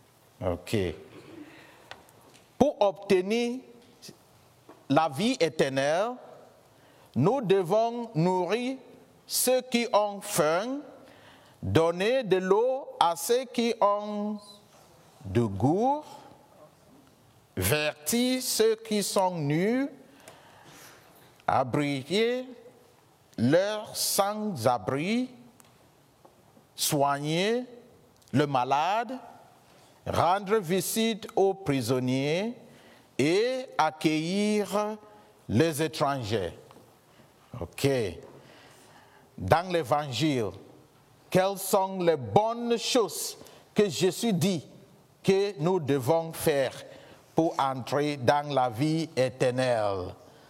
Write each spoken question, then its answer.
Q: Dans l'Évangile, quelles sont les bonnes choses que Jésus dit que nous devons faire pour entrer dans la vie éternelle?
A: Accueillir les étrangers, bien sûr.